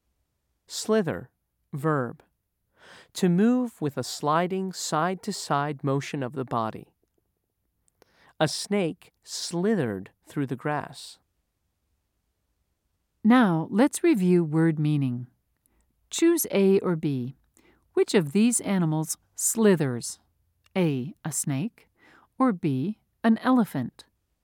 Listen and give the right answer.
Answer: If you said A, you were right.